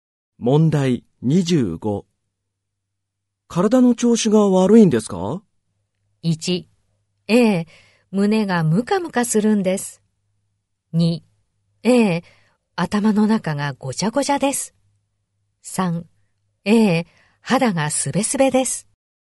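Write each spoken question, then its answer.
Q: 体の調子が悪いんですか?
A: 3: ええ、胸がムカムカするんです。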